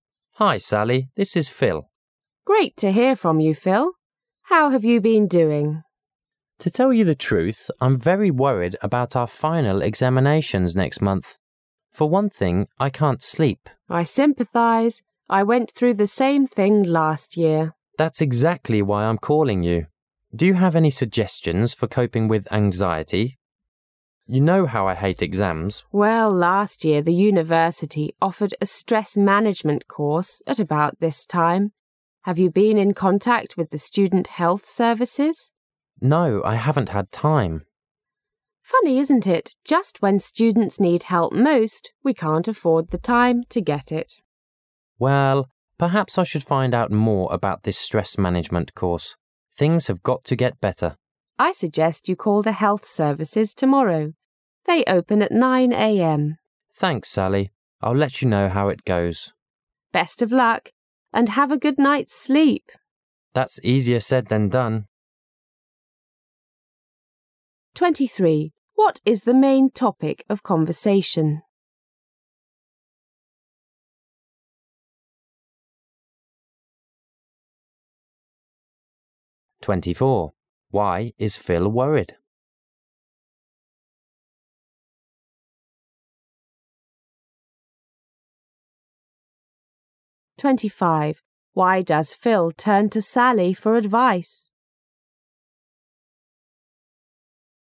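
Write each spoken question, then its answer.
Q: What is the main topic of conversation?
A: How Phil can cope with his anxiety about the final exams

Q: Why is Phil worried?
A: Because of the final examinations next month

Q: Why does Phil turn to Sally for advice?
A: She went through the same thing last year

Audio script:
[解析] 23-25 W: Hello. M: Hi, Sally, this is Phil. W: Great to hear from you Phil! How have you been doing? M: To tell you the truth, I'm very worried about our final examinations next month. For one thing, I can't sleep. I went through the same thing last year. M: That's exactly why I'm calling you. Do you have any suggestions for coping with anxiety? You know how I hate exams! W: Well, last year the university offered a stress-management course at about this time. Have you been in contact with the student health services? M: No, I haven't had time! W: Funny, isn't it? 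Just when students need help most, we can't afford the time to get it! M: Well, perhaps I should find out more about this stress-management course. Things have got to get better! W: I suggest you call the health services tomorrow. They open at nine a. m. I'll let you know how it goes. W: Best of luck! And have a good night's sleep! M: That's easier said than done! What is the main topic of the conversation?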